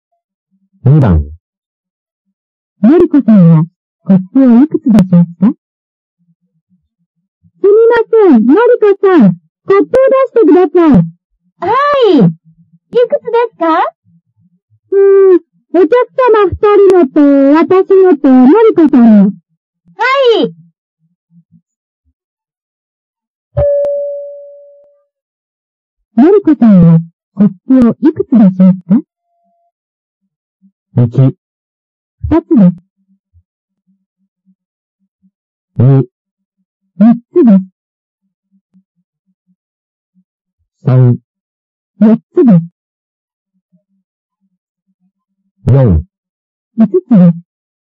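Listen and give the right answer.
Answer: 3: 4つです。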